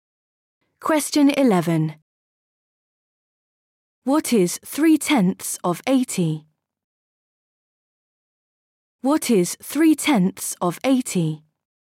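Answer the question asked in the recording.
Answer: 24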